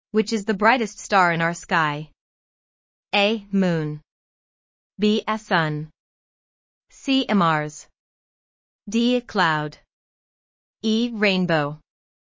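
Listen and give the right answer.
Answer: B: A sun.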